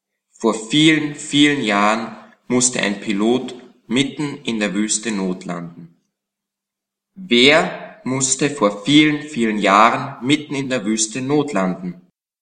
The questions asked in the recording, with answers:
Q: Wer musste vor vielen, vielen Jahren mitten in der Wüste notlanden?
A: Ein Pilot musste mitten in der Wüste notlanden.